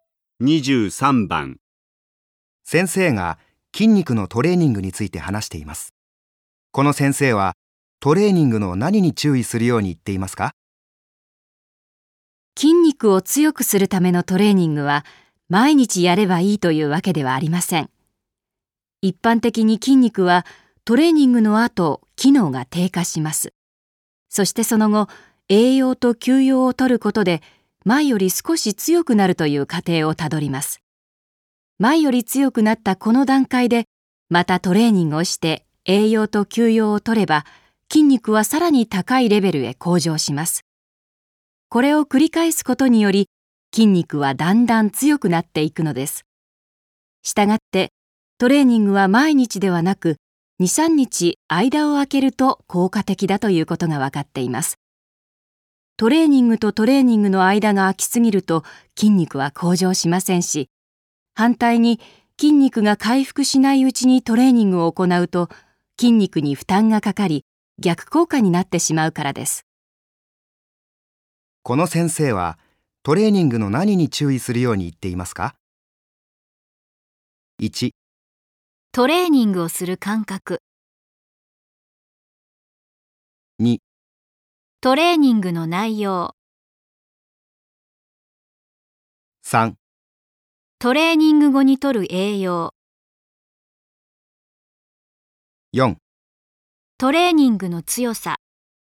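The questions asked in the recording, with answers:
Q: この先生はトレーニングの何に注意するように言っていますか?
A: 1: トレーニングをする間隔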